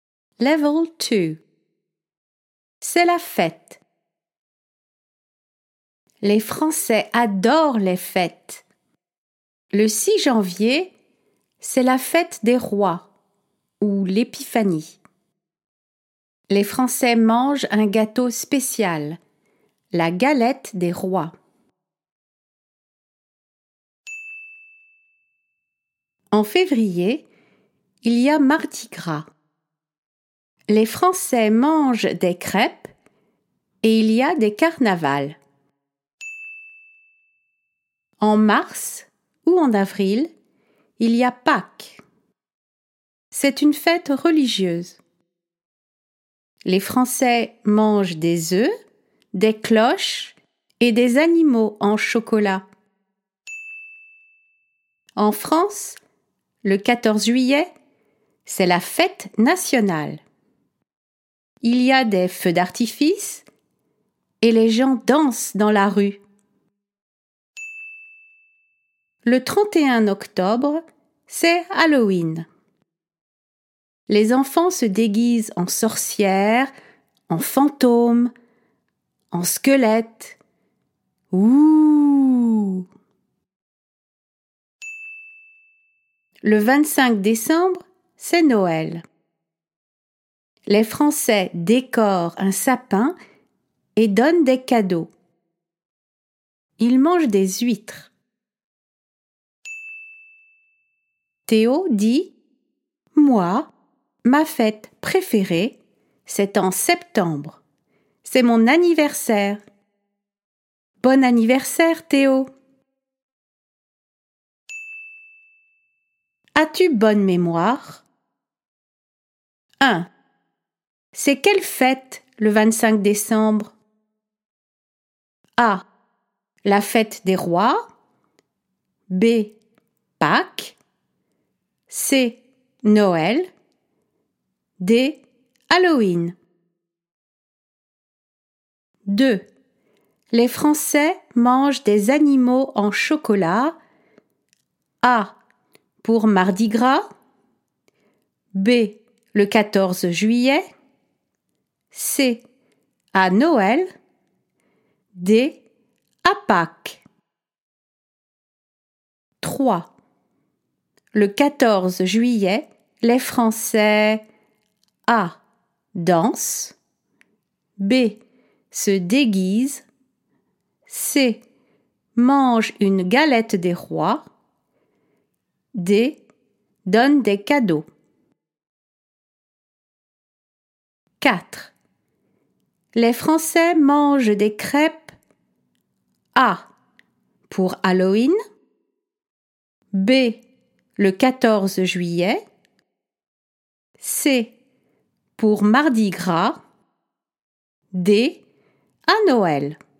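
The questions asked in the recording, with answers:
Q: C'est quelle fête le 25 décembre?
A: C: Noël

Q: Les Français mangent des animaux en chocolat.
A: D: à Pâques

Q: Le 14 juillet, les Français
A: A: dansent

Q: Les Français mangent des crêpes.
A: C: pour Mardi Gras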